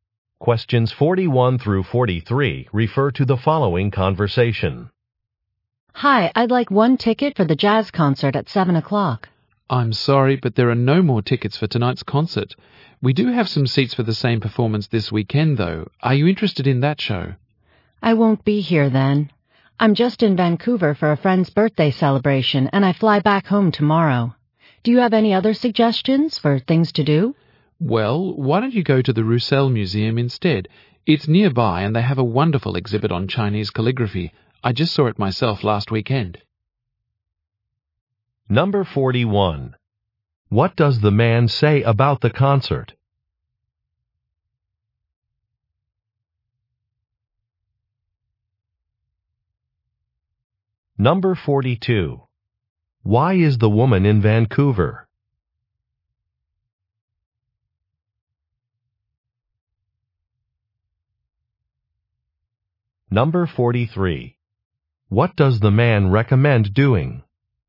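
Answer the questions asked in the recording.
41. Tonight's concert is sold out
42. For a friend's birthday celebration
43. Visiting the Roussel Museum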